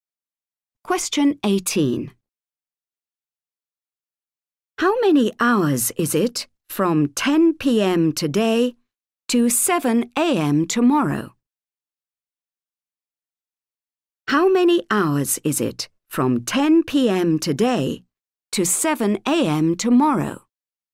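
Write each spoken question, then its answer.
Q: How many hours is it from 10 p.m. today to 7 a.m. tomorrow?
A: 9 hours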